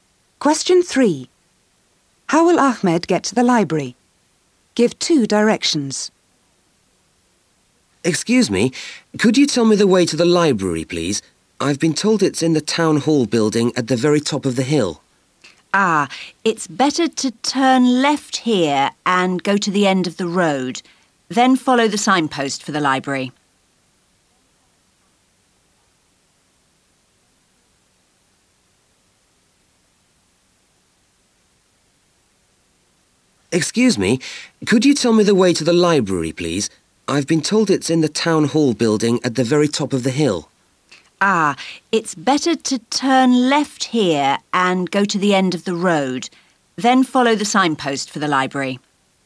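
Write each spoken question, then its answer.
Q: How will Ahmed get to the library?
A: Turn left, go to the end of the road, then follow the signpost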